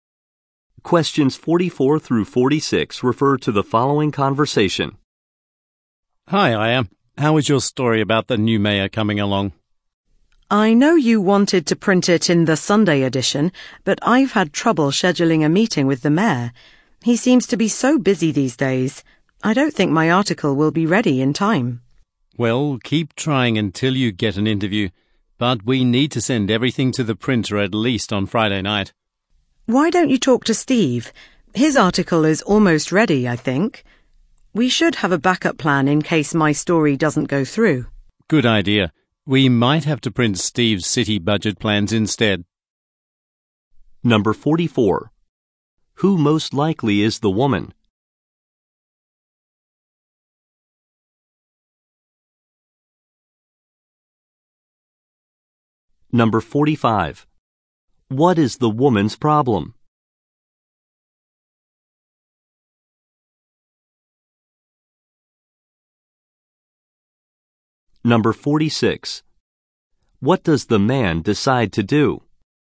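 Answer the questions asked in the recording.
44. A newspaper reporter.
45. She can't schedule a meeting with the mayor.
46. Possibly print Steve's article instead.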